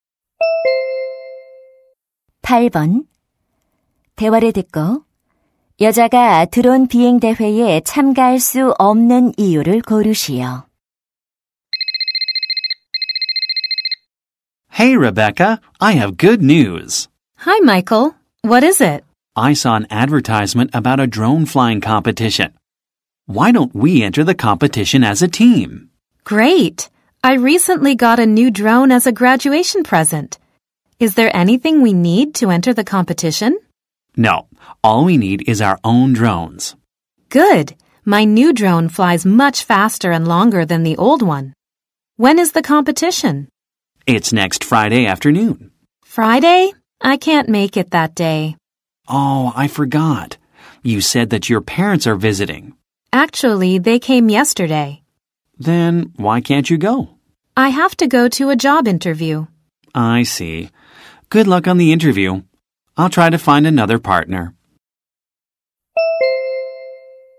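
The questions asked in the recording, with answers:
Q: 대화를 듣고 여자가 드론 비행 대회에 참가할 수 없는 이유를 고르시오.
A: 취업 면접에 가야 해서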